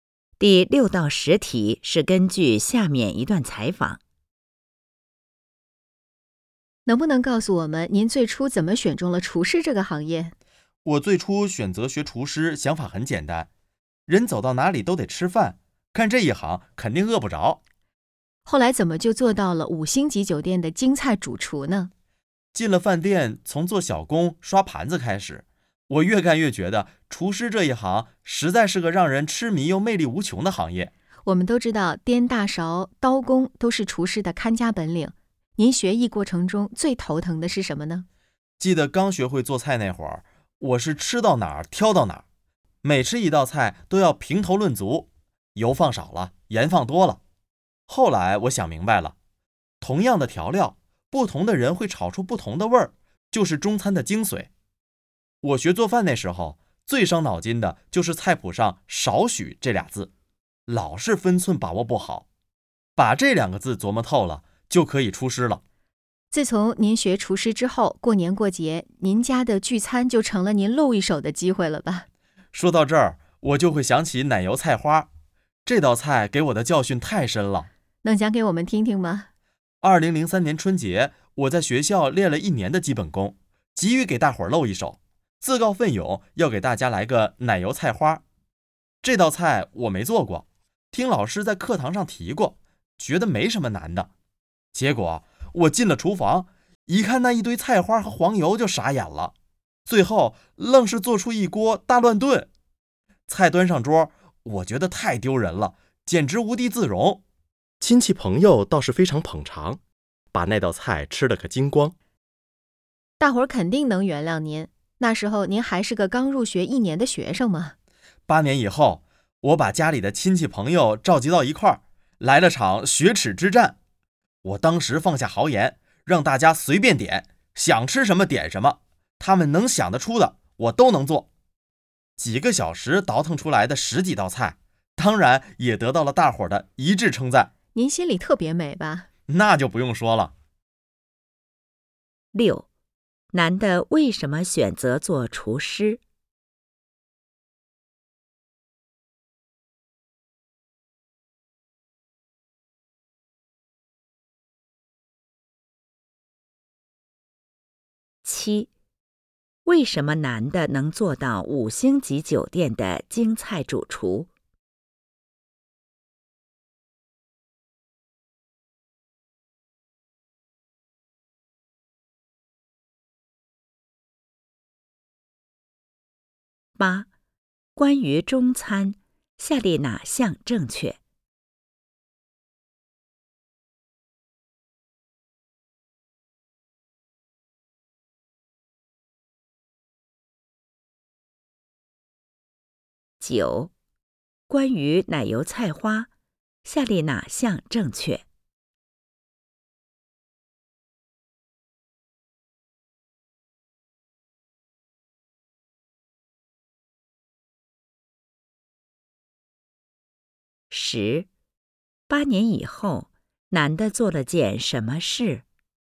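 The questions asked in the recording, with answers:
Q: 男的为什么选择做厨师?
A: 人走到哪里都得吃饭,干这一行肯定饿不着

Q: 为什么男的能做到五星级酒店的京菜主厨?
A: 他越干越觉得厨师这一行让人痴迷、魅力无穷

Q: 8年以后,男的做了件什么事?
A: 召集亲戚朋友,让大家随便点菜,做了十几道菜(雪耻)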